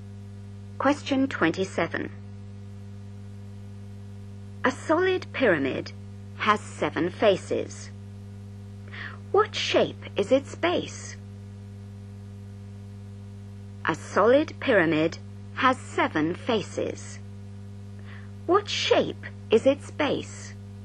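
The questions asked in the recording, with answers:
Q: What shape is its base?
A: hexagon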